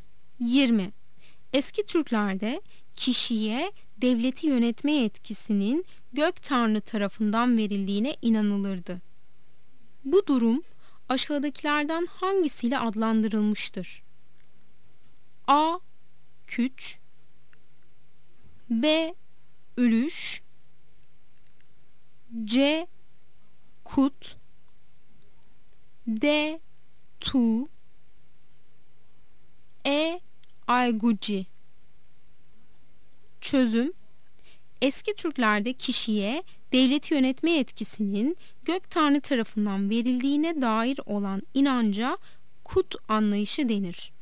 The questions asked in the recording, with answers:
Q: Bu durum aşağıdakilerden hangisiyle adlandırılmıştır?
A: Yanıt C'dir. Kut.